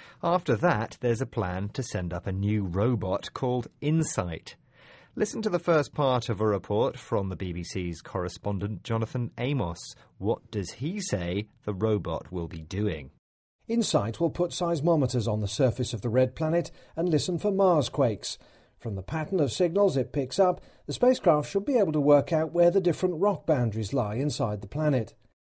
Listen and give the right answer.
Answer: Yes, the robot will put some seismometers on the surface of Mars.